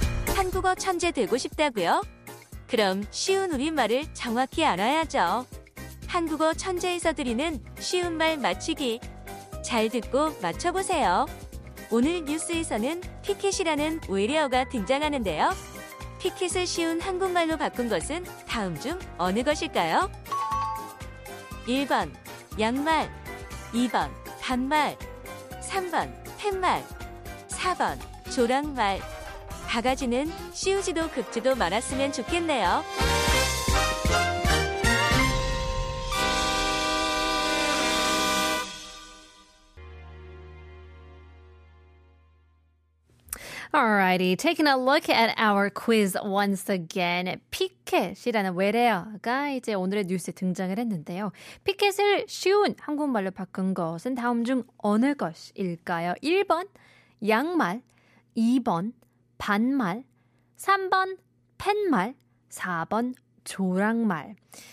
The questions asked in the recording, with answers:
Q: 피켓을 쉬운 한국말로 바꾼 것은 다음 중 어느 것일까요?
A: picket 정답은 3번.